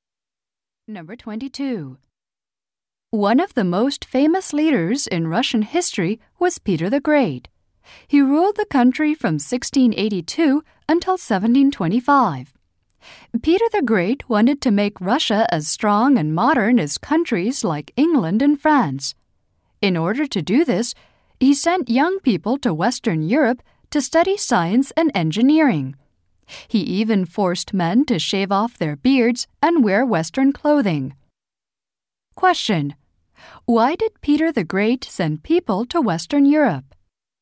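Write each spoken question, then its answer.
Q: Why did Peter the Great send people to Western Europe?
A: To study science and engineering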